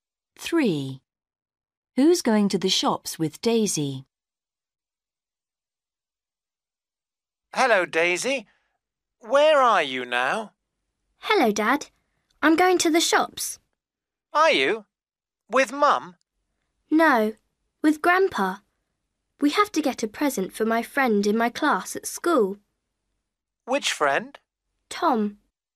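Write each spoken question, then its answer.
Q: Who's going to the shops with Daisy?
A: Grandpa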